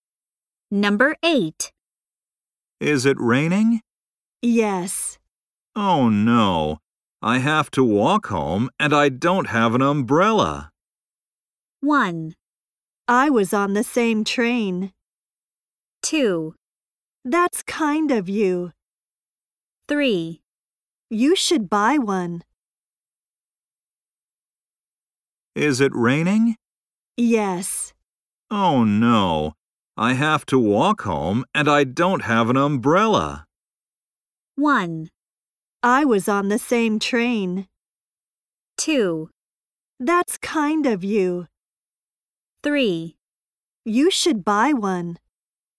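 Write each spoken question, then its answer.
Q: Oh no, I have to walk home and I don't have an umbrella.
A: 3: You should buy one.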